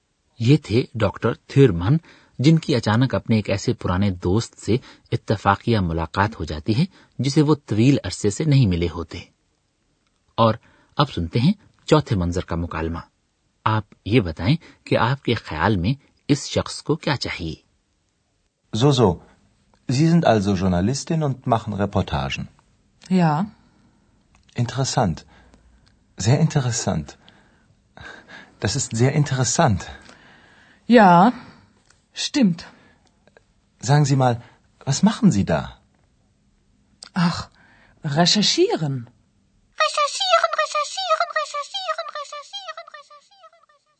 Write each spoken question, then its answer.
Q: آپ یہ بتائیں کہ آپ کے خیال میں اس شخص کو کیا چاہیے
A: ایک نوجوان شخص ایک خاتون کے ساتھ بات چیت شروع کرنے کا خواہاں تھا